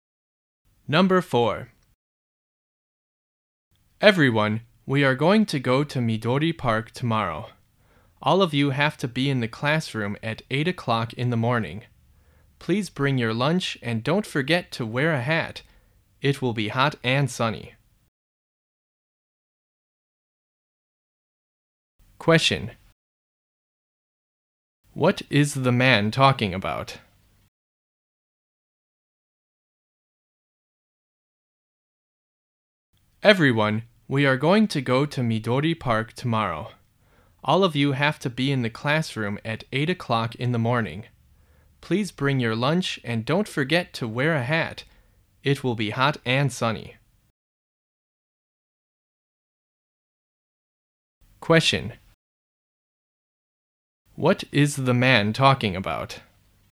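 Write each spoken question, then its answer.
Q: What is the man talking about?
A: Tomorrow's trip to Midori Park.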